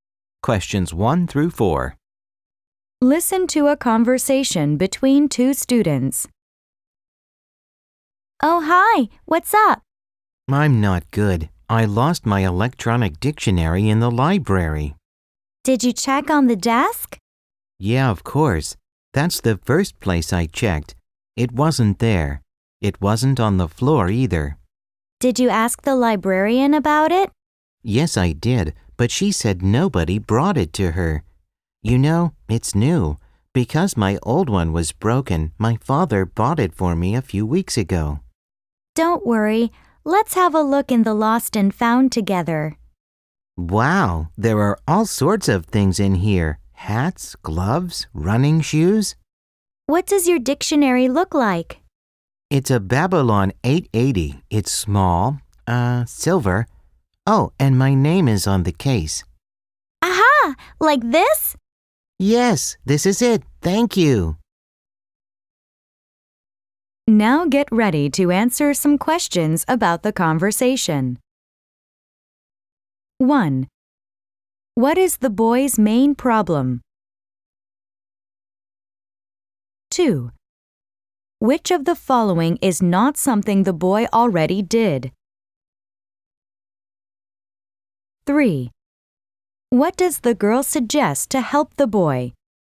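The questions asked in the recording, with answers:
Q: What is the boy's main problem?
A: He lost his electronic dictionary in the library

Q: What does the girl suggest to help the boy?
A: Looking in the lost and found together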